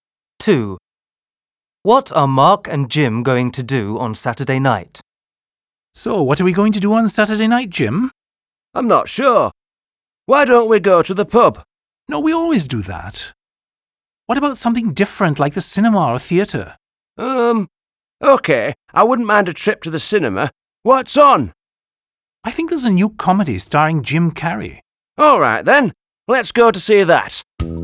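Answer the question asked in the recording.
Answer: Go to the cinema to see a comedy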